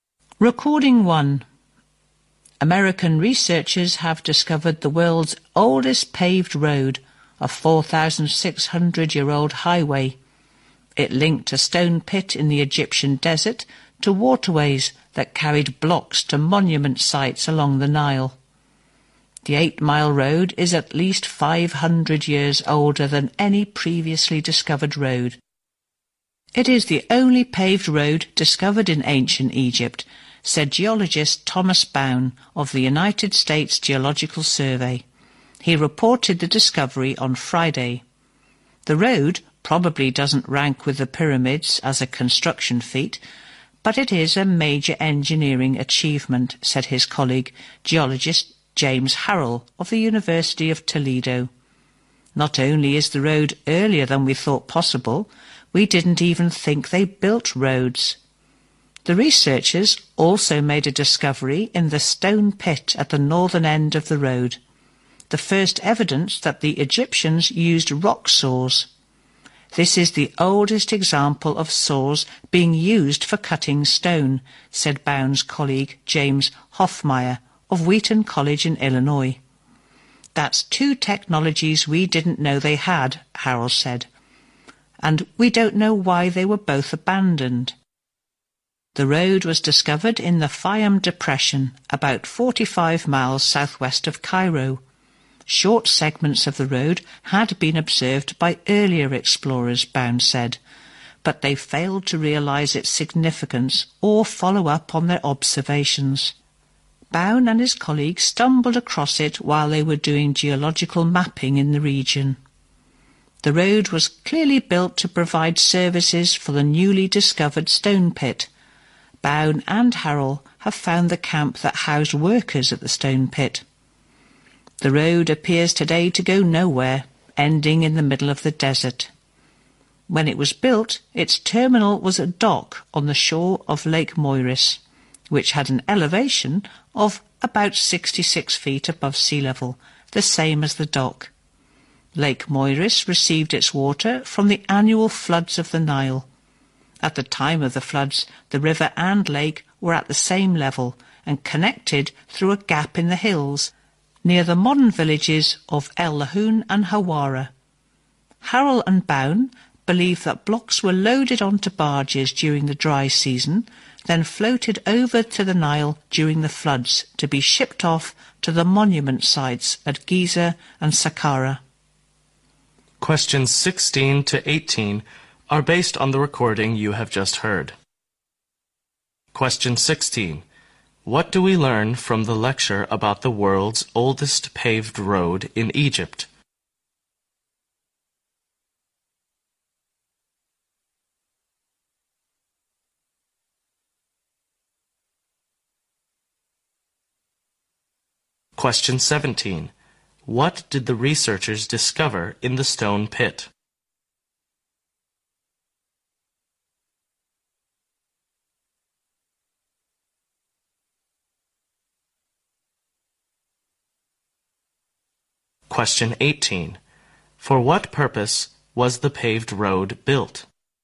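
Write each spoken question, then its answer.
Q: What did the researchers discover in the stone pit?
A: The first evidence that the Egyptians used rock saws

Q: For what purpose was the paved road built?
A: To serve the stone pit, carrying blocks to waterways to be shipped to monument sites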